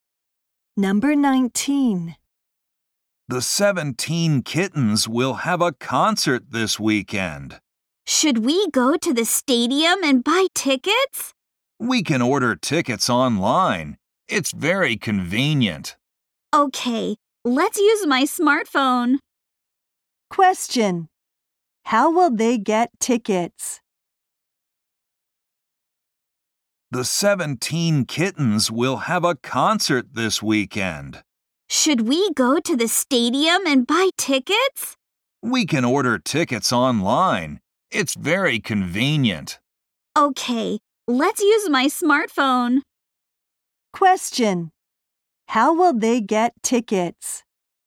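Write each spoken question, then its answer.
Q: How will they get tickets?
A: Online, with a smartphone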